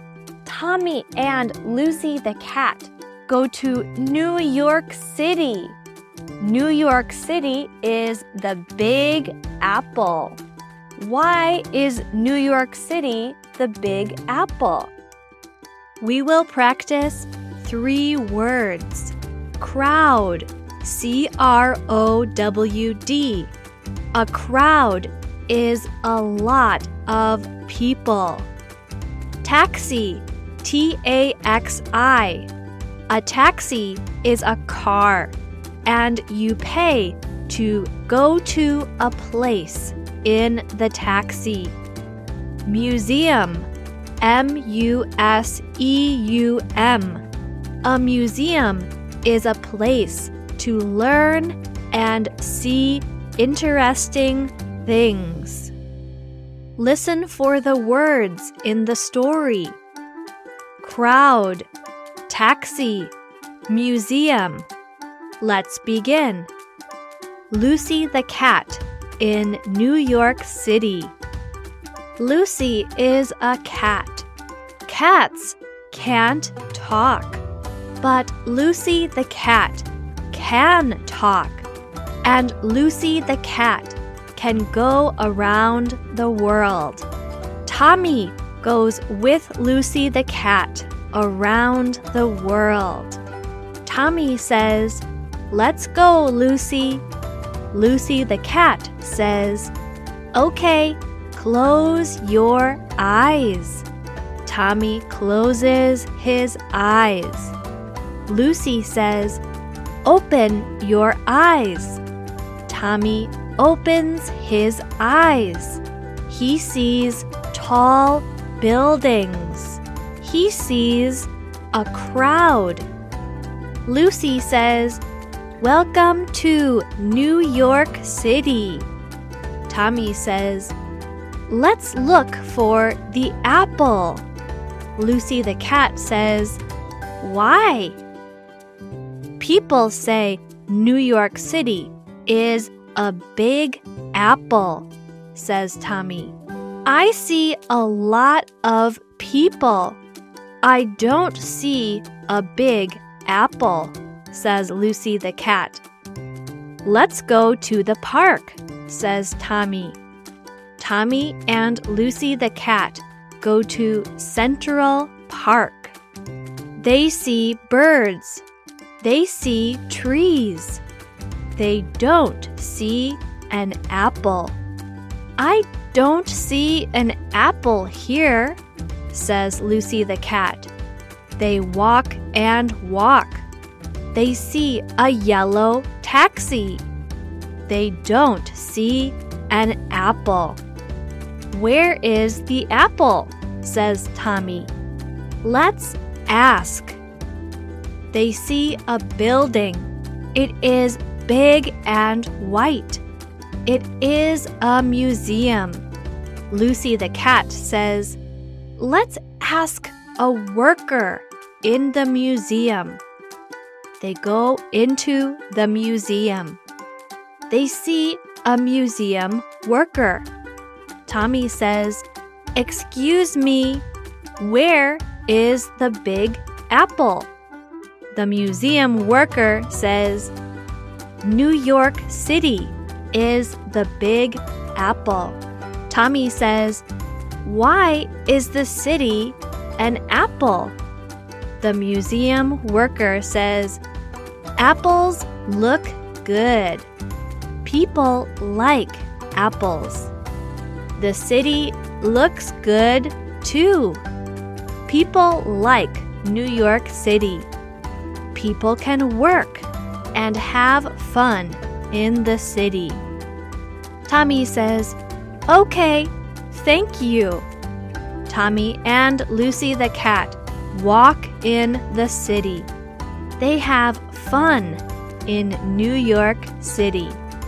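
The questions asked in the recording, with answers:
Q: Why is New York City the Big Apple?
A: Apples look good and people like apples; the city looks good too and people like New York City.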